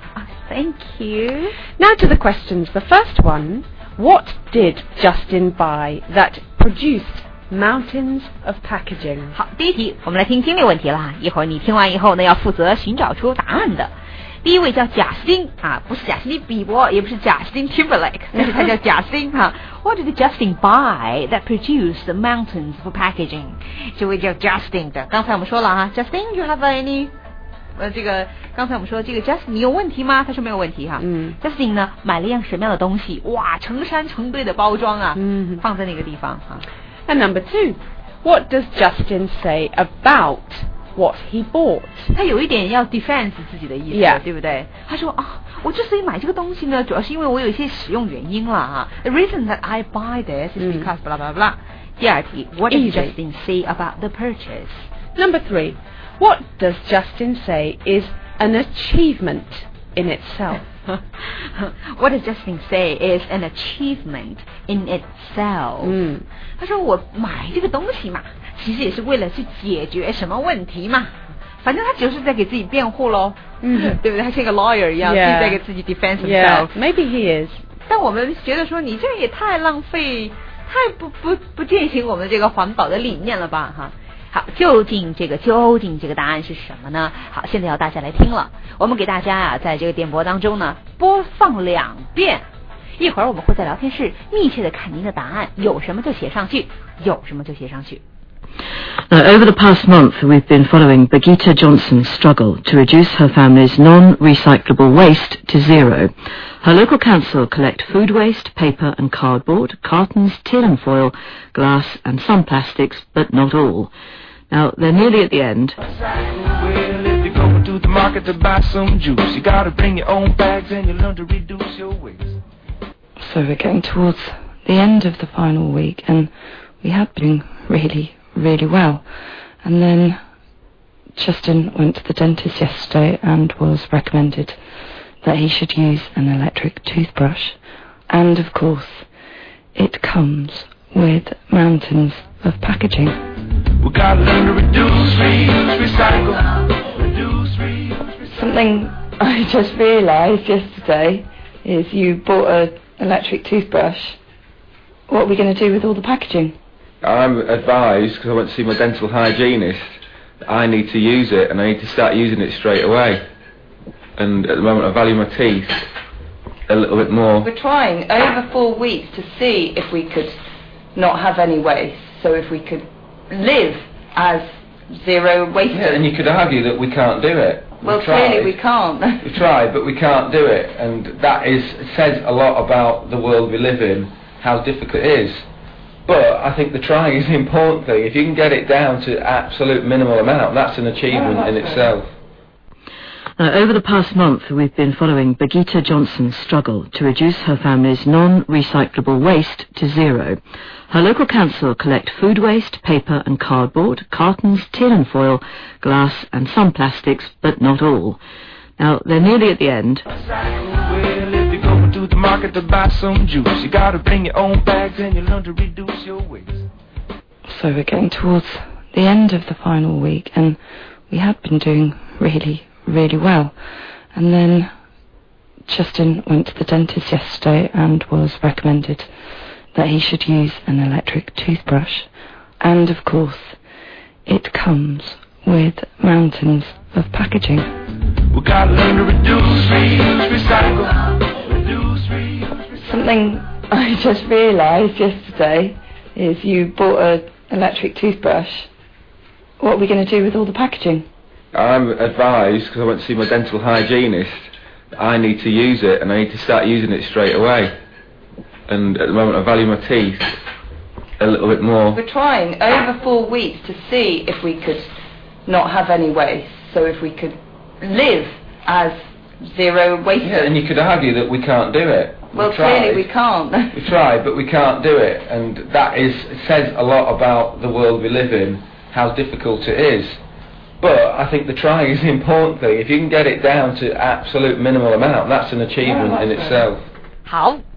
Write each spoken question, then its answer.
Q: What did Justin buy that produced mountains of packaging?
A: An electric toothbrush.

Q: what does Justin say about what he bought?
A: I valued my teeth more than the packaging

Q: What does Justin say is an achievement in itself?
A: getting the waste down to the absolute minimum, as little as possible.